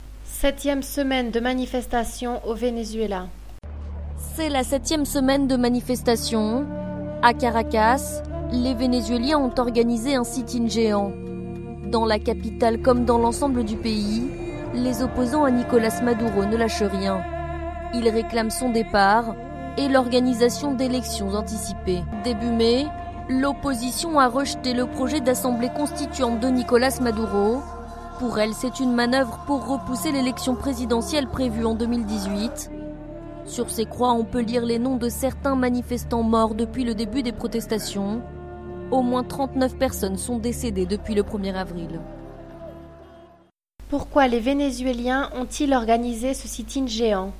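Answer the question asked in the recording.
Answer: Pour réclamer le départ de Nicolas Maduro et l'organisation d'élections anticipées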